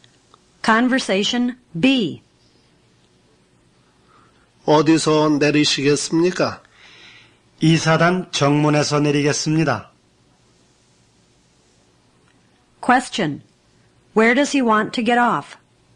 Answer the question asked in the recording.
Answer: He wants to get off at the 2nd Division's main gate.